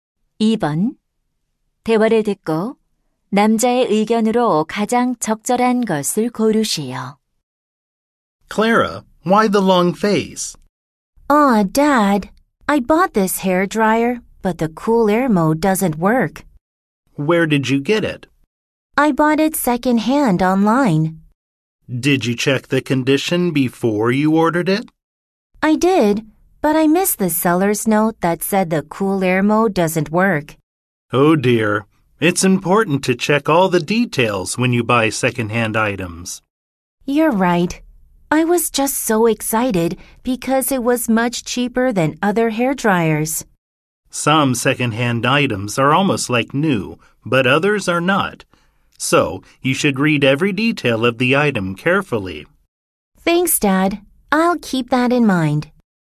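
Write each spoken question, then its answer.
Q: 대화를 듣고 남자의 의견으로 가장 적절한 것을 고르시오.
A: 중고 물품을 살 때는 세부 사항을 꼼꼼히 확인해야 한다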